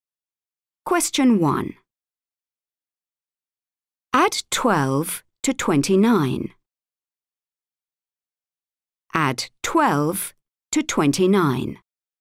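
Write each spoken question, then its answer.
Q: Add 12 to 29.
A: 41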